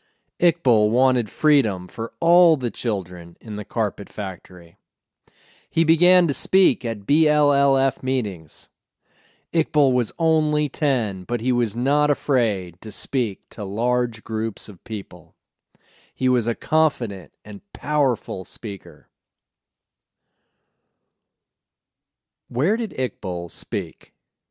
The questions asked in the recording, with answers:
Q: Where did Iqbal speak?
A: He spoke at BLLF meetings.